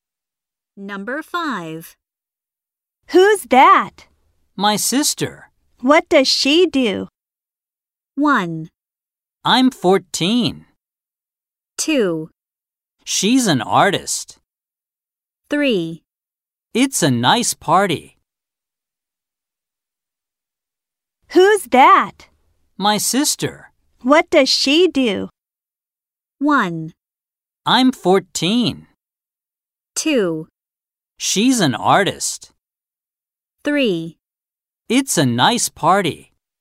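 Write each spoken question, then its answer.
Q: What does she do?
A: 2: She's an artist.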